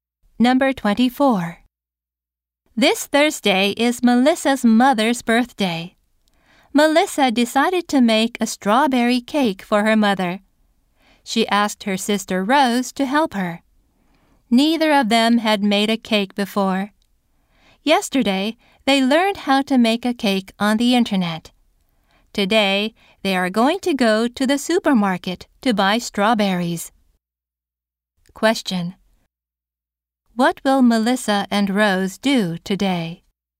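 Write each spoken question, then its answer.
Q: What will Melissa and Rose do today?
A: Go to the supermarket to buy strawberries.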